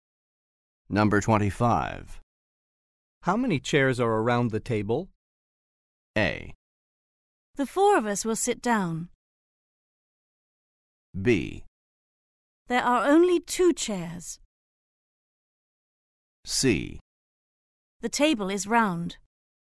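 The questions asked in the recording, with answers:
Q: How many chairs are around the table?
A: B: There are only two chairs.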